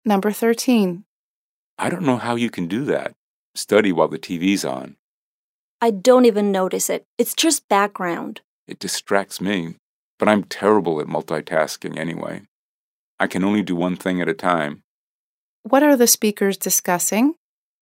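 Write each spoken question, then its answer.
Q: What are the speakers discussing?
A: Studying while the TV is on (whether they can concentrate with background distraction)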